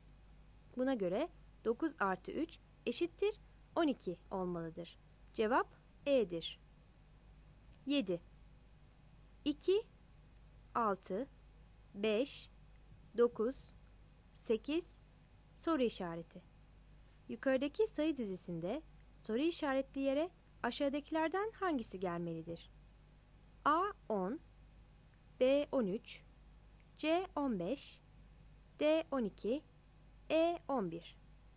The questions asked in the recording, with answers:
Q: Yukarıdaki sayı dizisinde soru işaretli yere aşağıdakilerden hangisi gelmelidir?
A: Cevap D seçeneğidir.